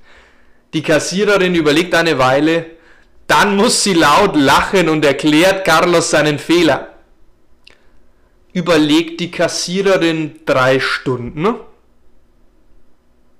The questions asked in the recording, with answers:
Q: Überlegt die Kassiererin 3 Stunden?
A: Nein, sie überlegt eine Weile.